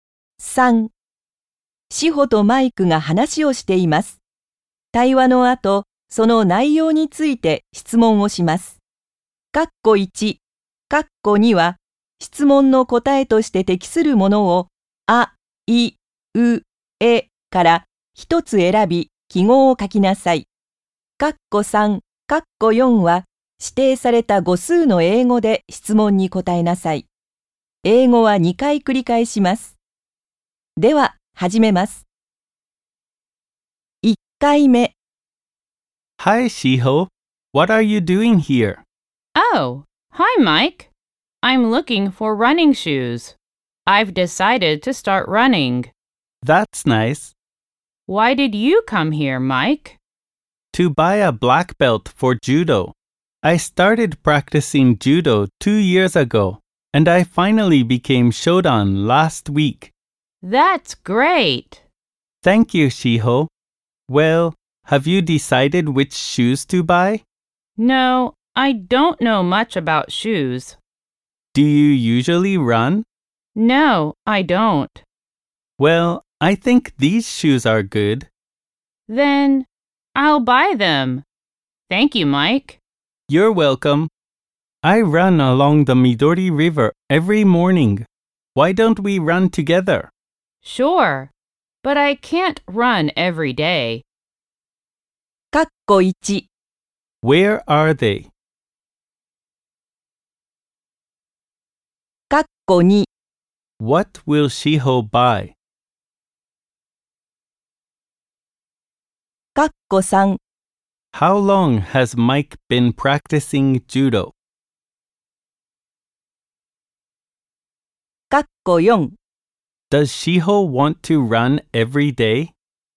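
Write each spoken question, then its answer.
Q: What will Shiho buy?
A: Running shoes

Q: How long has Mike been practicing judo?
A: For two years

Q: Does Shiho want to run every day?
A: No, she doesn't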